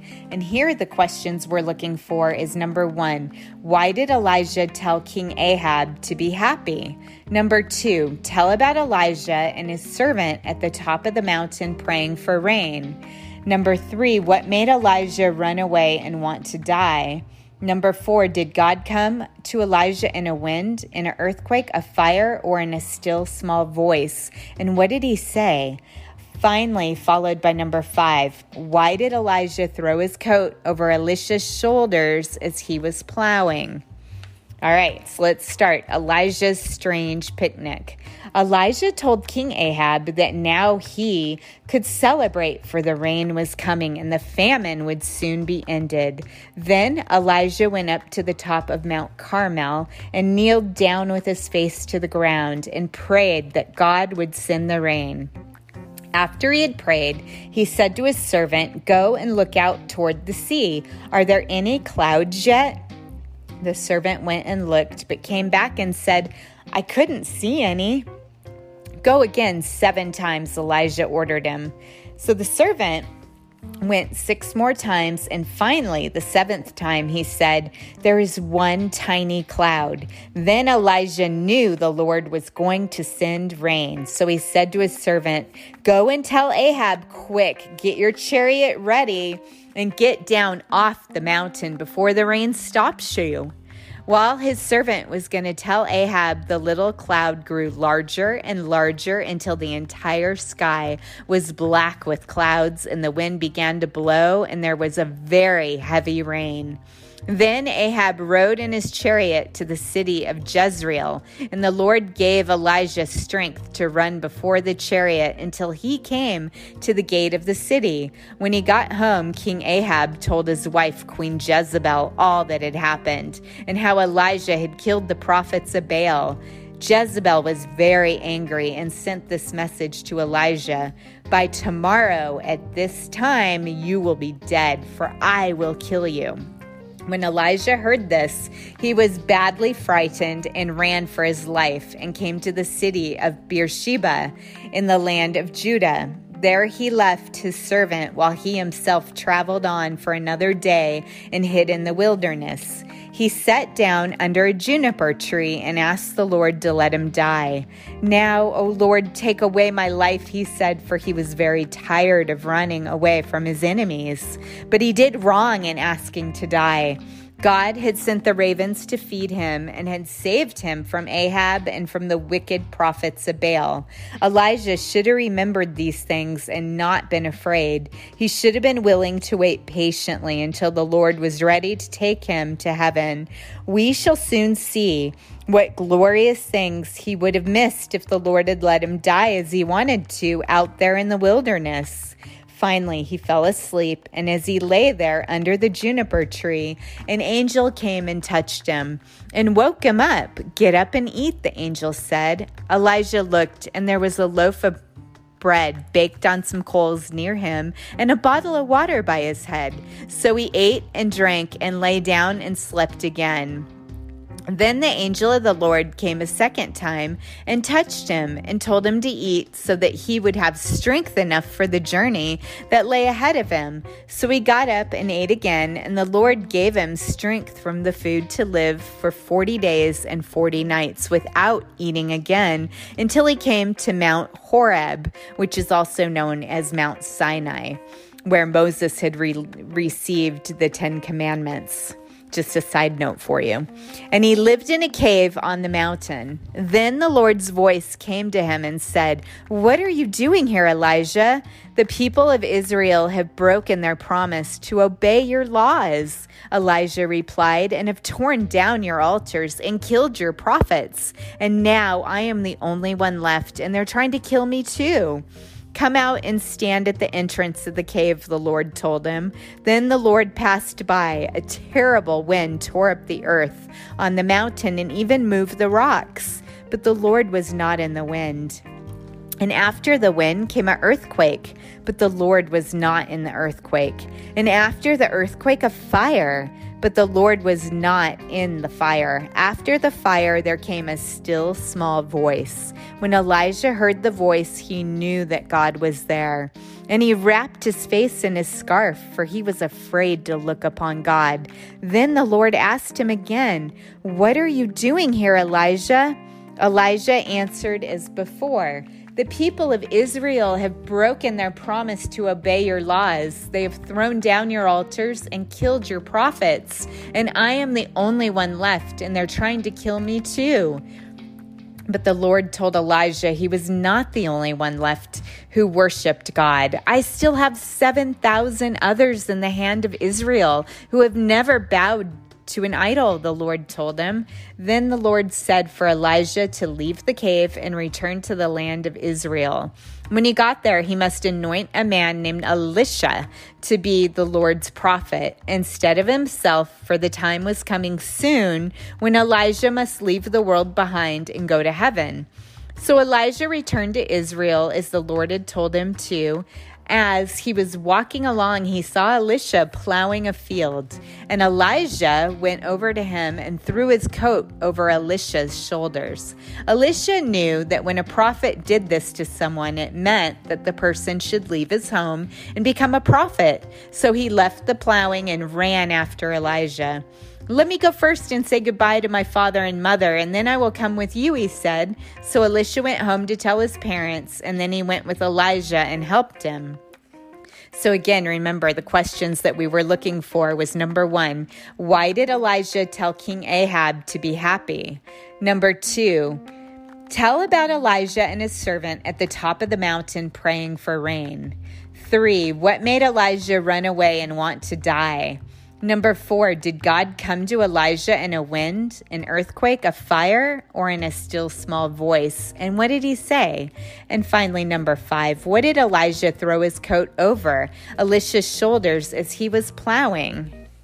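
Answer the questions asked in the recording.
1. Because rain was coming and the famine would soon end
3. Queen Jezebel's message that she would kill him
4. In a still small voice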